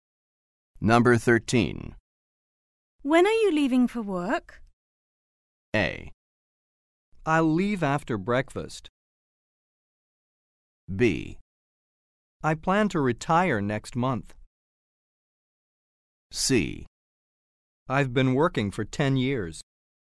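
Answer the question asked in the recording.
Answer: A: I'll leave after breakfast.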